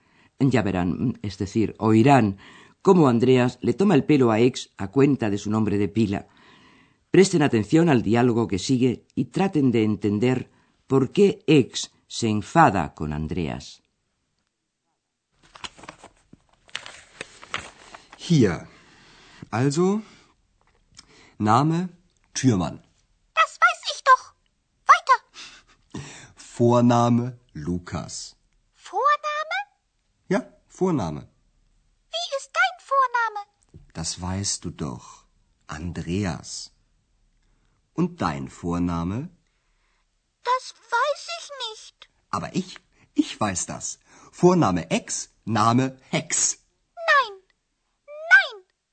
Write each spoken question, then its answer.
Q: traten de entender por qué X se enfada con Andreas.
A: Ex se enfada con Andreas porque éste le inventa un apellido que rima con su nombre, el que ya conocemos, Ex, y el apellido Hex, que viene a ser la abreviatura de Hexe, bruja, y eso no le gusta a Ex.